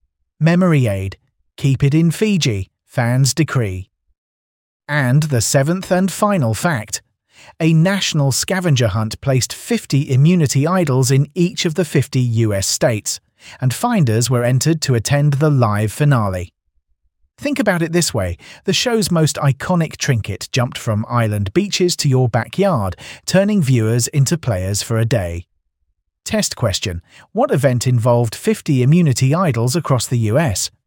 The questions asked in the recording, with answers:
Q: What event involved 50 immunity idols across the US?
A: National scavenger hunt.